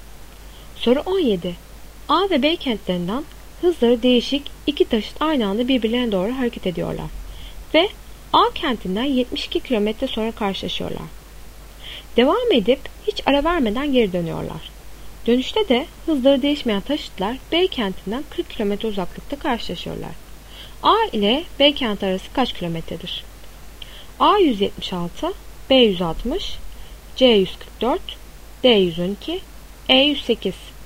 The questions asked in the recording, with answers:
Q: A ile B kenti arası kaç kilometredir?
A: Doğru cevap A 176.